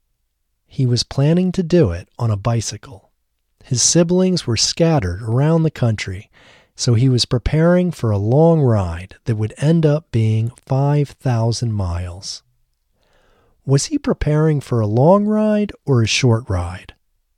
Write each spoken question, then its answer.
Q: Was he preparing for a long ride or a short ride?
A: He was preparing for a long ride.